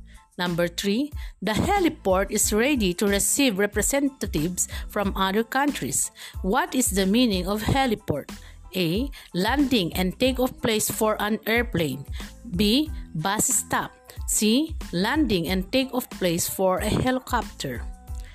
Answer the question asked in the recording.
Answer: Yes, letter C. Landing and takeoff place for a helicopter.